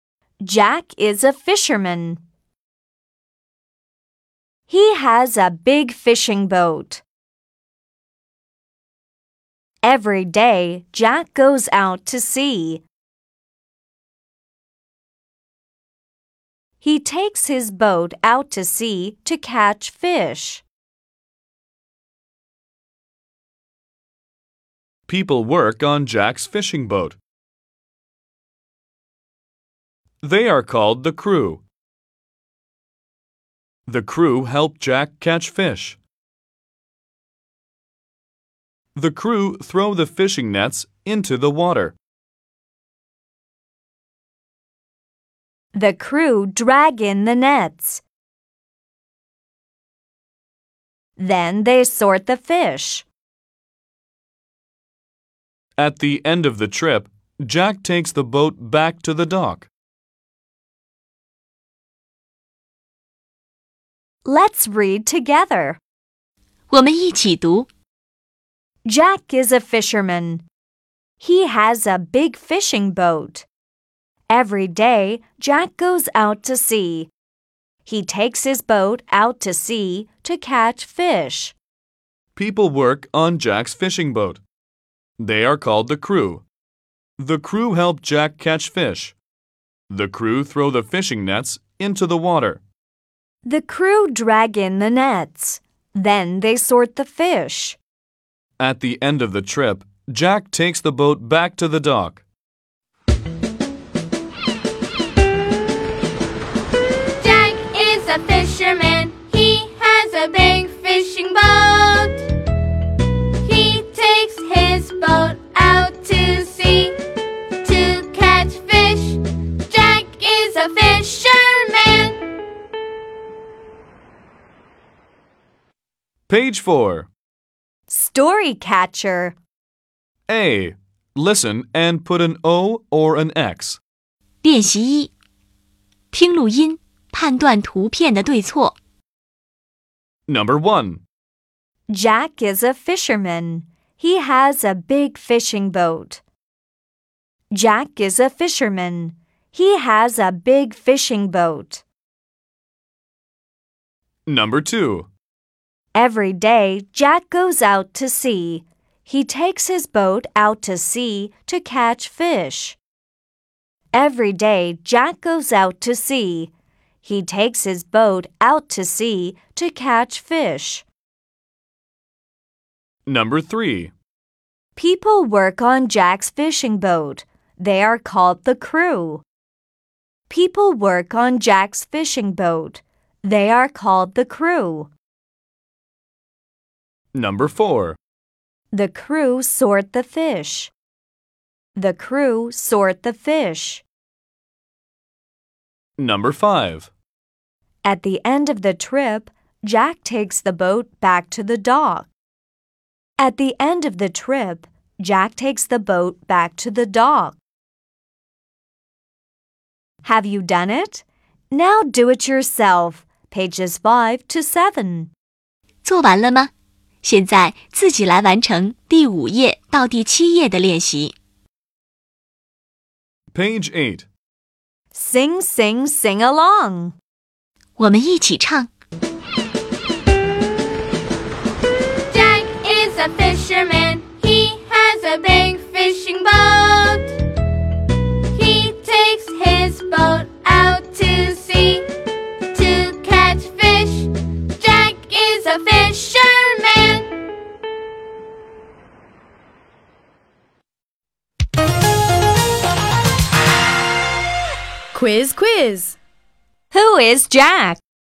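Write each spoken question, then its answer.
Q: Who is Jack?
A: A fisherman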